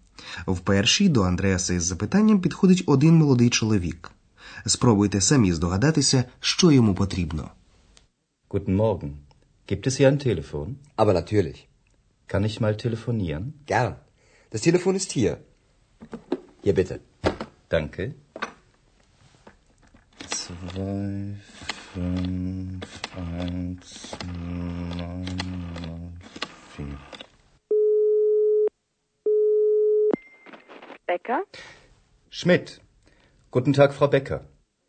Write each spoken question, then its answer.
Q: Спробуйте самі здогадатися, що йому потрібно.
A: Чи зрозуміли ви, що юнак запитував в Андреаса про телефон?